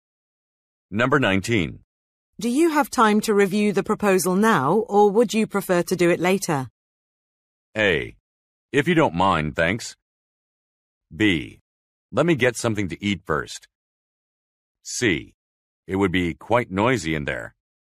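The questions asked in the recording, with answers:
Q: Do you have time to review the proposal now, or would you prefer to do it later?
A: B: Let me get something to eat first.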